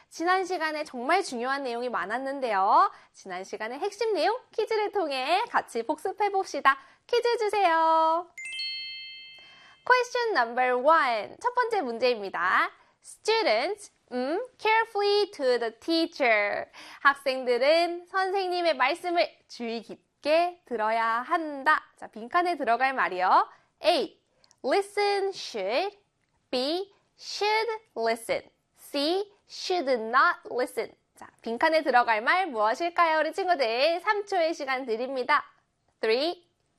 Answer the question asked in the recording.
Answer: 그렇죠. B에 should listen이요.